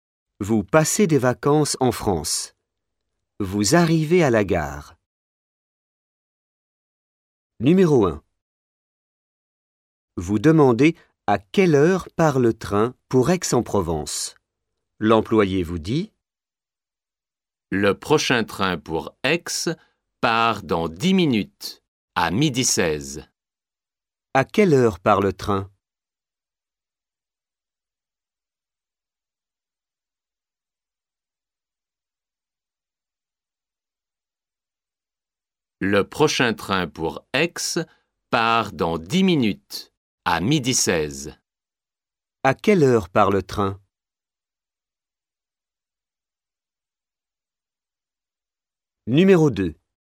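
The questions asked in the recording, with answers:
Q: À quelle heure part le train?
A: À 12h16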